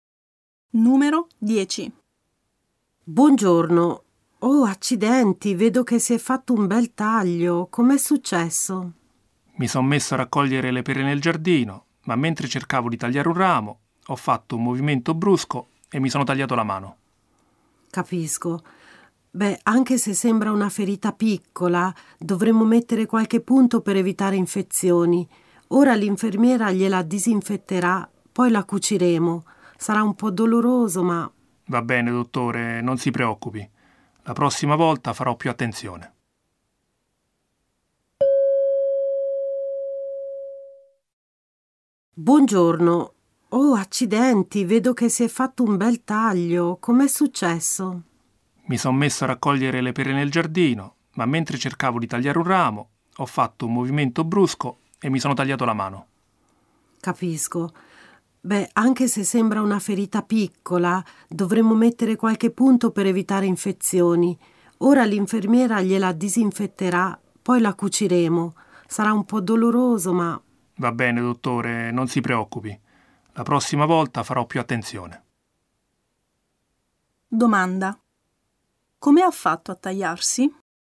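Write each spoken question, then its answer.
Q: Come ha fatto a tagliarsi?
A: Mentre raccoglieva le pere in giardino, ha fatto un movimento brusco cercando di tagliare un ramo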